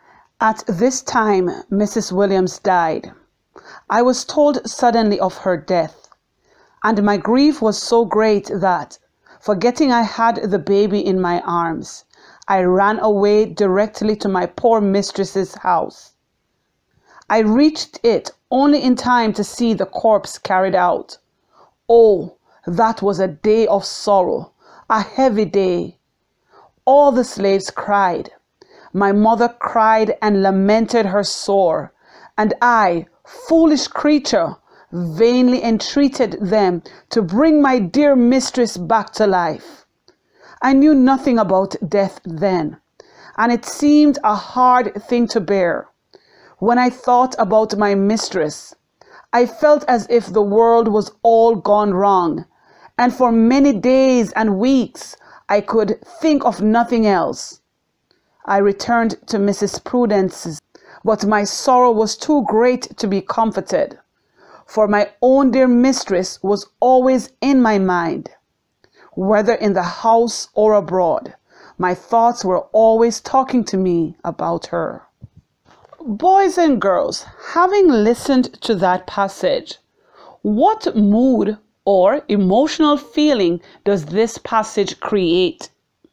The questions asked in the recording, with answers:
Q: Boys and girls, having listened to that passage, what mood or emotional feeling does this passage create?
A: Perhaps you said the passage created a mood of sadness or even disappointment.